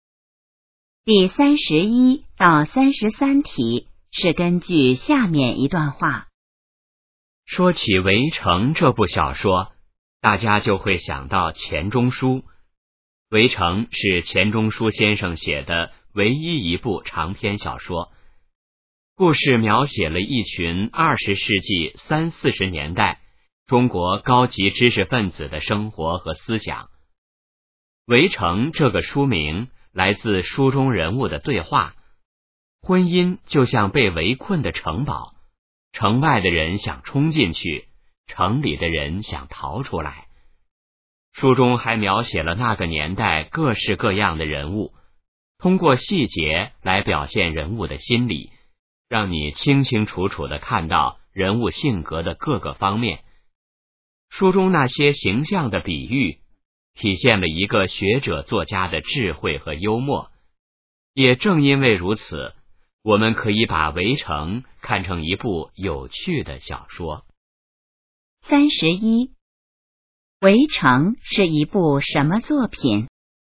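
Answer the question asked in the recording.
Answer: 钱钟书先生写的唯一一部长篇小说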